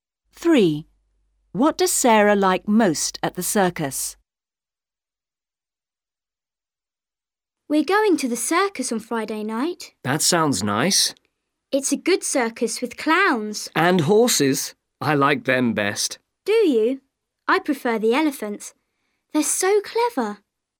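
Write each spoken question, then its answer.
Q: What does Sarah like most at the circus?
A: The horses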